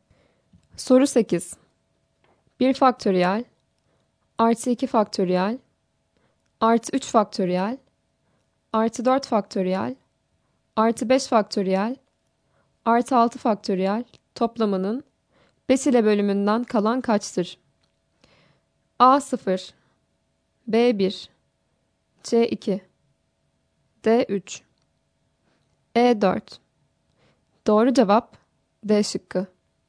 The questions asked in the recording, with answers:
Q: 1 faktöriyel artı 2 faktöriyel artı 3 faktöriyel artı 4 faktöriyel artı 5 faktöriyel artı 6 faktöriyel toplamının 5 ile bölümünden kalan kaçtır?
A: Doğru cevap D şıkkı.